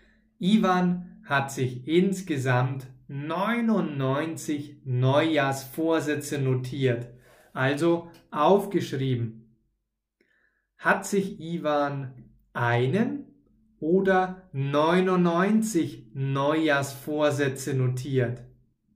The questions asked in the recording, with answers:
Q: Hat sich Ivan einen oder 99 Neujahrsvorsätze notiert.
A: Neunundneunzig. Er hat sich 99 Neujahrsvorsätze notiert.